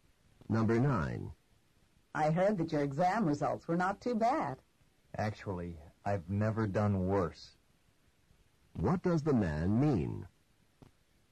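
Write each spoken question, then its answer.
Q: What does the man mean?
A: His results were the worst he's ever had.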